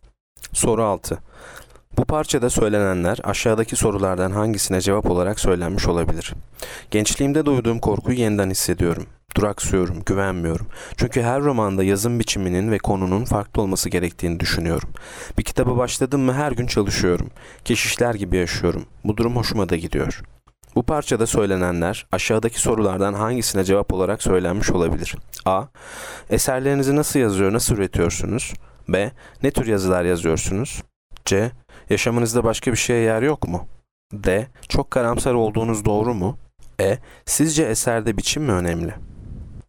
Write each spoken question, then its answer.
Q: Bu parçada söylenenler aşağıdaki sorulardan hangisine cevap olarak söylenmiş olabilir?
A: Yanıt A. Eserlerinizi nasıl yazıyor, nasıl üretiyorsunuz?